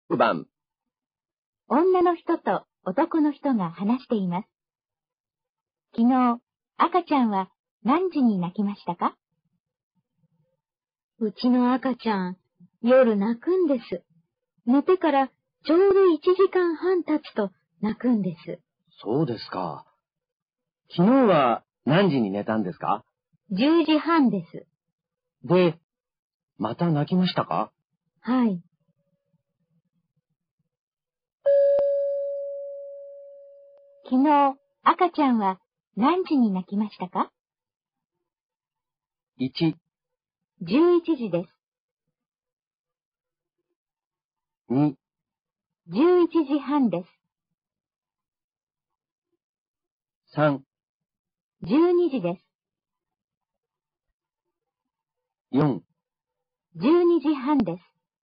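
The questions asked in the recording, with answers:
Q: 昨日、赤ちゃんは何時に泣きましたか?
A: 3: 12時です。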